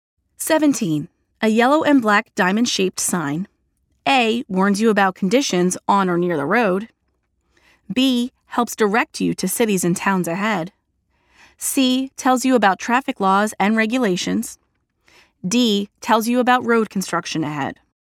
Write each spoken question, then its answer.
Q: A yellow and black diamond-shaped sign.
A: The answer is letter A.